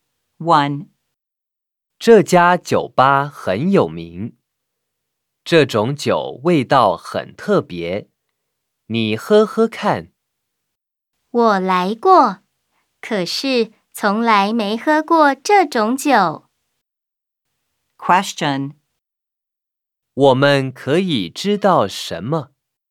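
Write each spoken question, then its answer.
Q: 我们可以知道什么?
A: 说话人来过这家酒吧,但从来没喝过这种酒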